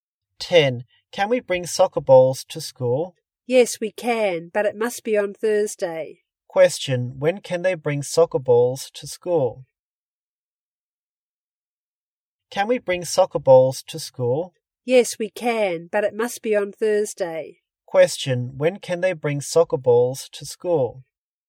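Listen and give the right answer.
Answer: On Thursday.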